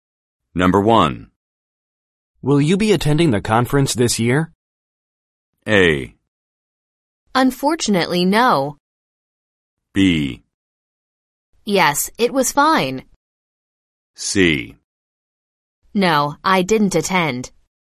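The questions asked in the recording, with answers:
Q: Will you be attending the conference this year?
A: A: Unfortunately, no.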